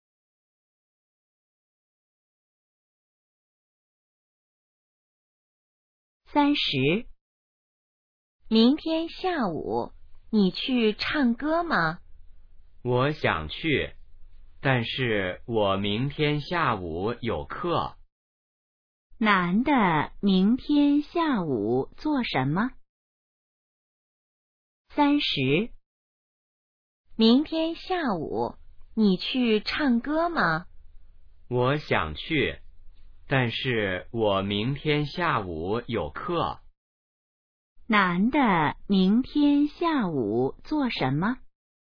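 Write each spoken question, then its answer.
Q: 男的明天下午做什么?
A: 上课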